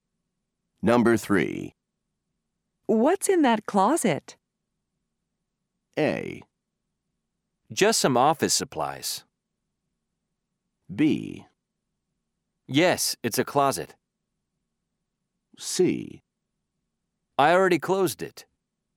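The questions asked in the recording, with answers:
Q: What's in that closet?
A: A: Just some office supplies.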